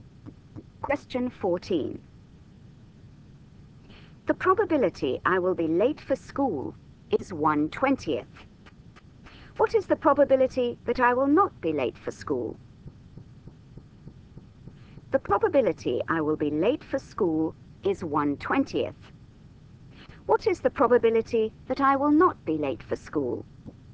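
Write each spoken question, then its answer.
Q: What is the probability that I will not be late for school?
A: 19/20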